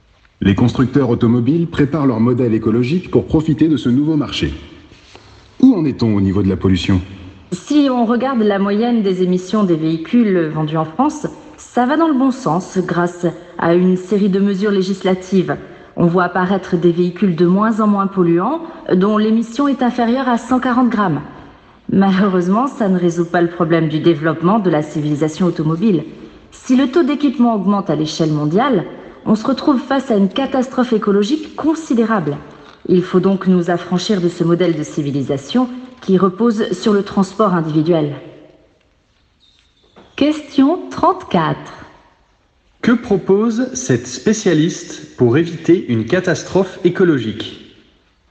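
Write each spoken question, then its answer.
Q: Que propose cette spécialiste pour éviter une catastrophe écologique ?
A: S'affranchir du modèle de civilisation reposant sur le transport individuel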